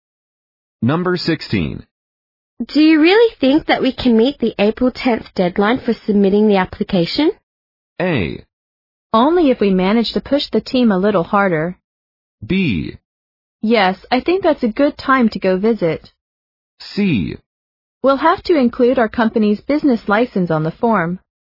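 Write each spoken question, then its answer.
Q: Do you really think that we can meet the April 10th deadline for submitting the application?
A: A: Only if we manage to push the team a little harder.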